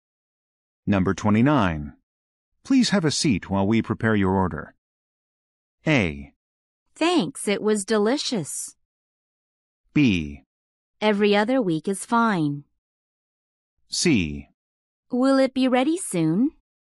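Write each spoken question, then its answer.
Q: Please have a seat while we prepare your order.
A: C: Will it be ready soon?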